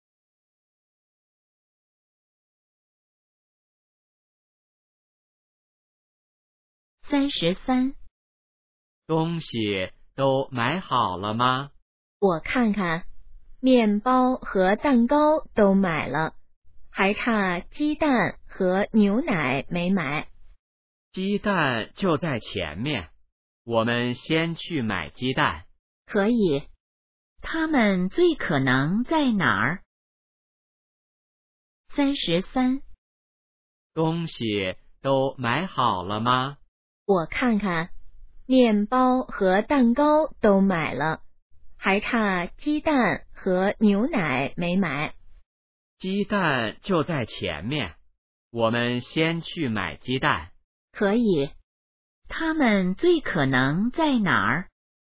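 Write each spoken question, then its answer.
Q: 他们最可能在哪儿?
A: 超市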